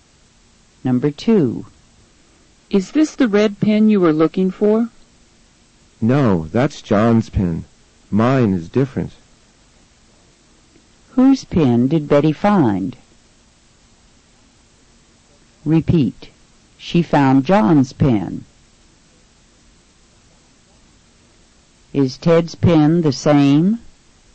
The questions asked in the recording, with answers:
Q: Is Ted's pen the same?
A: No, his pen is different.